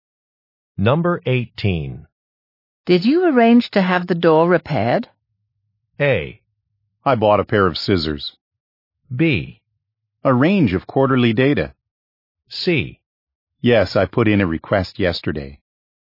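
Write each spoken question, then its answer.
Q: Did you arrange to have the door repaired?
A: C: Yes, I put in a request yesterday.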